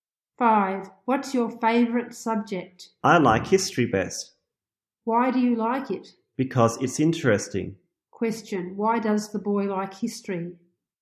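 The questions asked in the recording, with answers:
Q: Question, why does the boy like history?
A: Because it's interesting.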